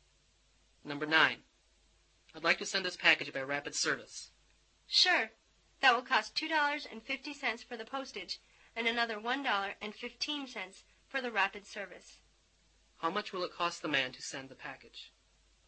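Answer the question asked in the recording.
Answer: $3.65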